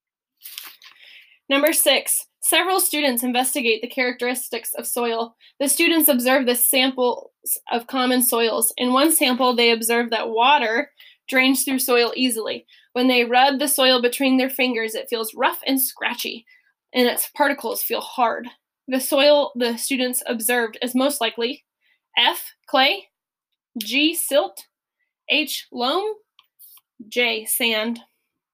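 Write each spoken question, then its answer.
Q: The soil the students observed is most likely F, clay, G, silt, H, loam, J, sand.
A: J: sand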